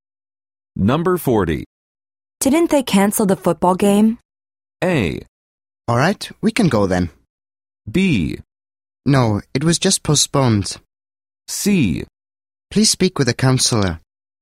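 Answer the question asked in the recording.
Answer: B: No, it was just postponed.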